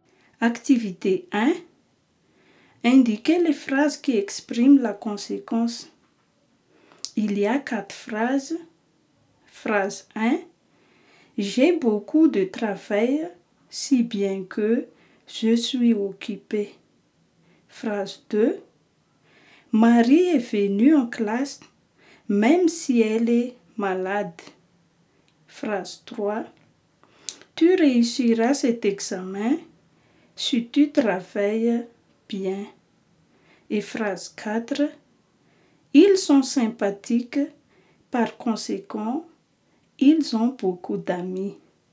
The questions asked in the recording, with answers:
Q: Indiquez les phrases qui expriment la conséquence.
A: Les phrases qui expriment la conséquence sont la phrase 1.